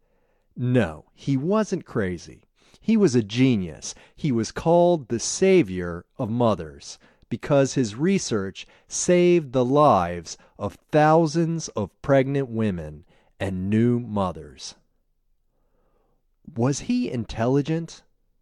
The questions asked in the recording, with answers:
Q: Was he intelligent?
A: Yes, he was a genius.